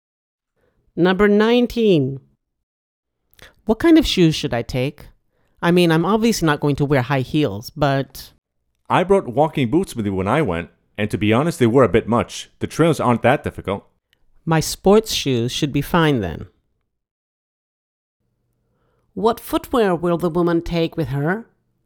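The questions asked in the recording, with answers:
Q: What footwear will the woman take with her?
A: Sports shoes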